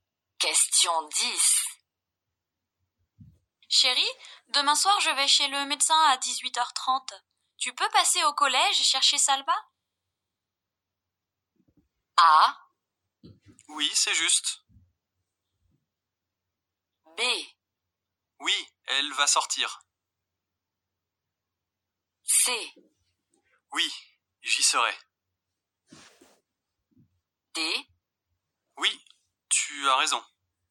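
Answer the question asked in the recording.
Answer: C: Oui, j'y serai.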